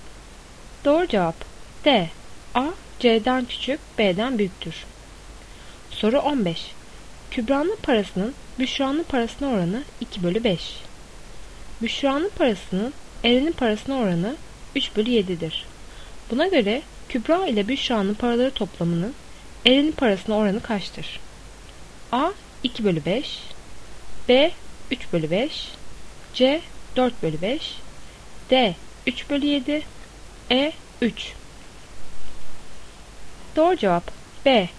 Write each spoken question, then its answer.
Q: Buna göre Kübra ile Büşra'nın paraları toplamının Eren'in parasına oranı kaçtır?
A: Doğru cevap B.